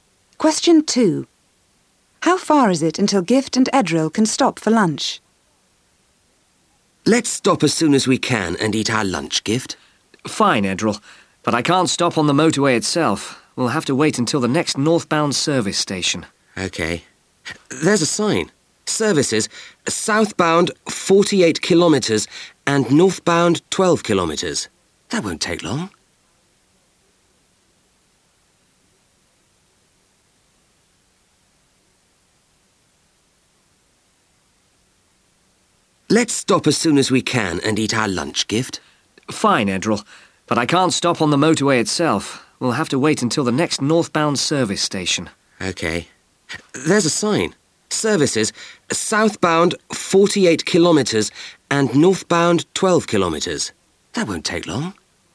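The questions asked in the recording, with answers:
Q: How far is it until Gift and Edril can stop for lunch?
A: 12 kilometres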